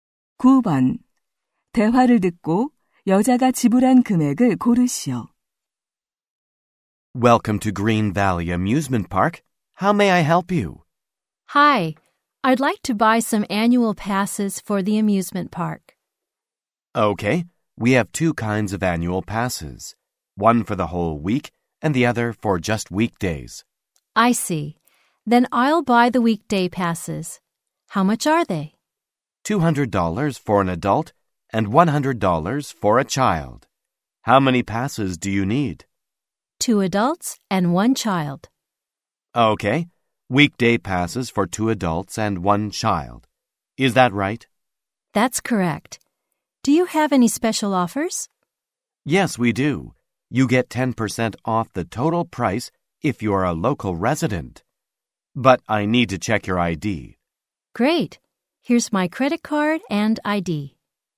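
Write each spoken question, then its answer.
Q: 대화를 듣고 여자가 지불한 금액을 고르시오.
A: $450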